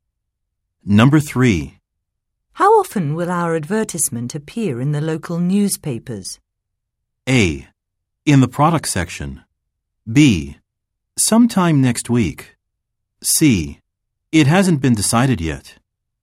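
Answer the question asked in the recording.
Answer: C: It hasn't been decided yet.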